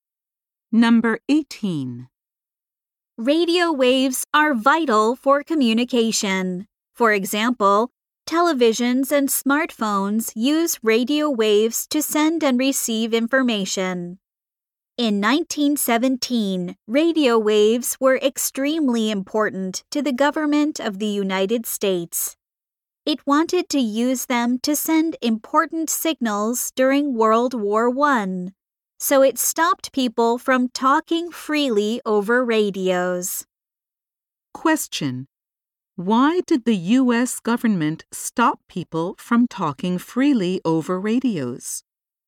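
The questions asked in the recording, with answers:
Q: Why did the U.S. government stop people from talking freely over radios?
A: It wanted to use radio waves to send important signals during World War I.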